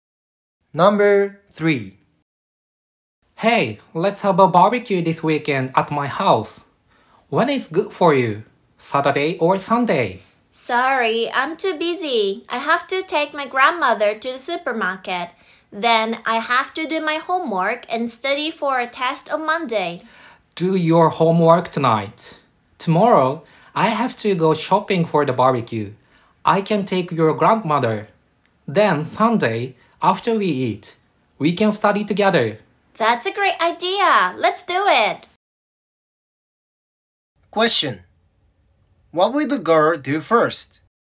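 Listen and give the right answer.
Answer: Do her homework (tonight)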